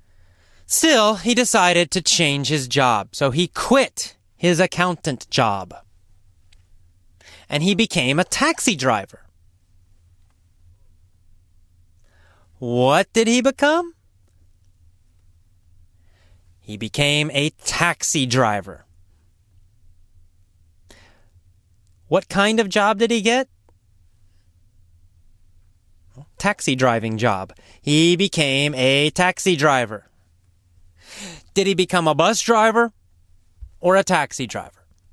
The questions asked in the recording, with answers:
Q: Did he become a bus driver or a taxi driver?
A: A taxi driver.